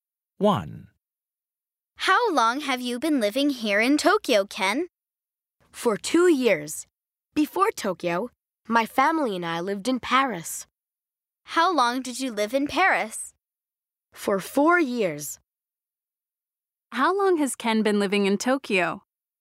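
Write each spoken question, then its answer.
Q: How long has Ken been living in Tokyo?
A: For 2 years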